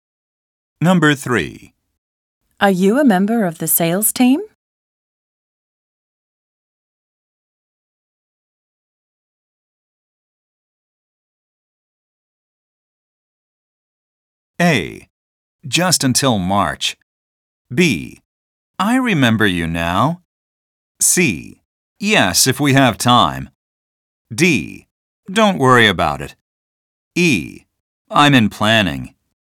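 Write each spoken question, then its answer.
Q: Are you a member of the sales team?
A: E: I'm in planning.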